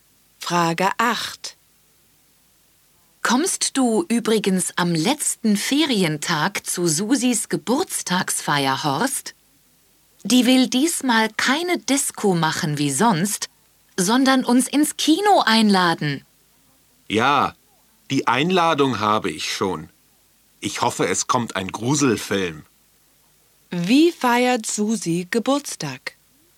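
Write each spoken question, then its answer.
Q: Wie feiert Susi Geburtstag?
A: Sie lädt ins Kino ein.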